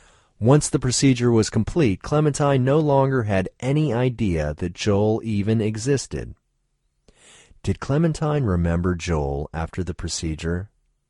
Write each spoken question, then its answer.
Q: Did Clementine remember Joel after the procedure?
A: No, Clementine didn't remember Joel after the procedure.